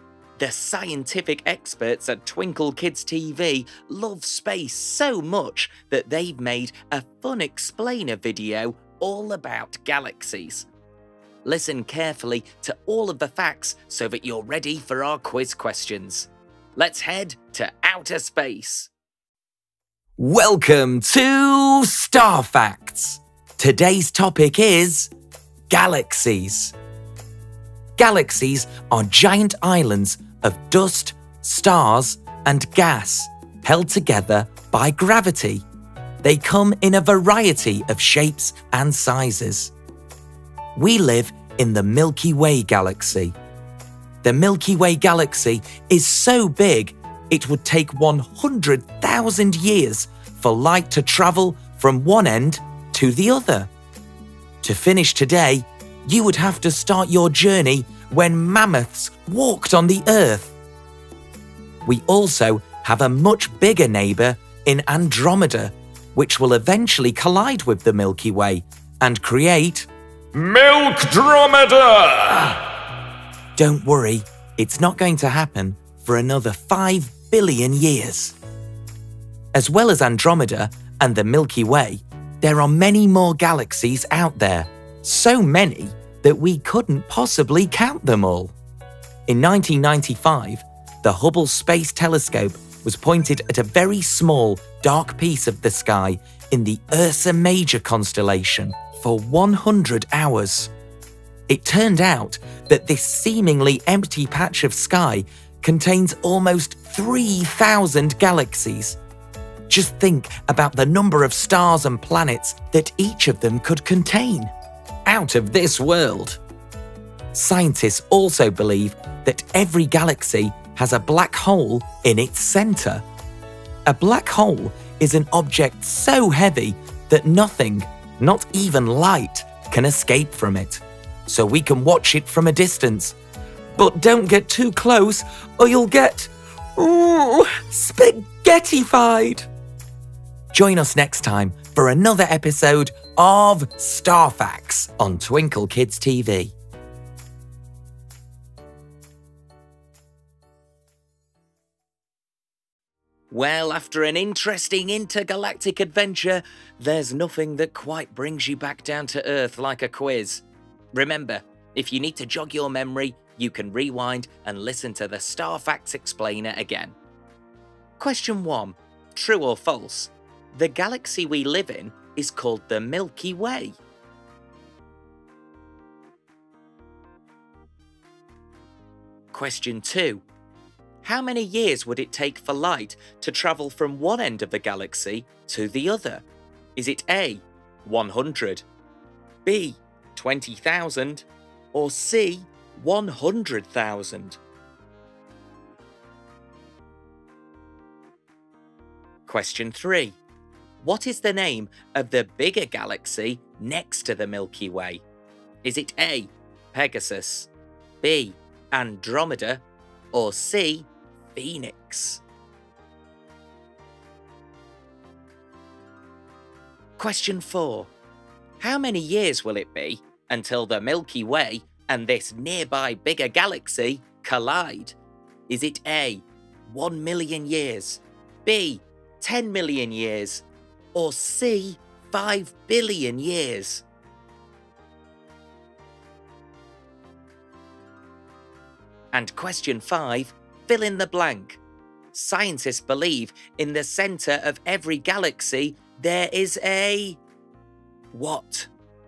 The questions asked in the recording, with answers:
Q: True or false? The galaxy we live in is called the Milky Way.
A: The answer is true.

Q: how many years would it take for light to travel from one end of the galaxy to the other?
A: Well, the Milky Way is so big that it would take 100,000 years for light to travel from one end to the other.

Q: What is the name of the bigger galaxy next to the Milky Way?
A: The answer is B.

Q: How many years will it be until the Milky Way and this nearby bigger galaxy collide?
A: It's C, it will be around 5 billion years until the Milky Way and Andromeda collide

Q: Scientists believe in the center of every galaxy there is a.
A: Scientists believe in the centre of every galaxy there is a black hole.